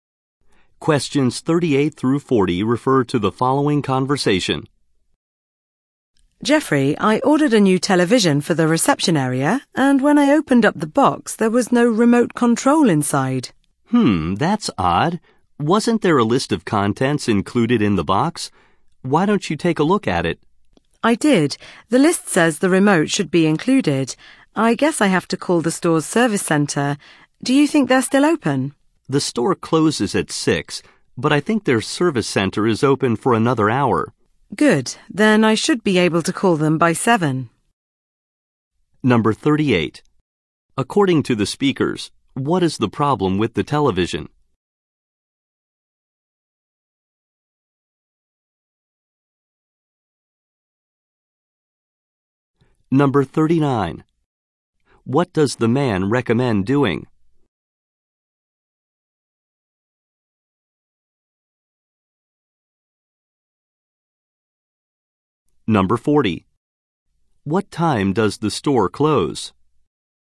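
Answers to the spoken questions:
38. The remote control is missing
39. Checking the list of contents
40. At 6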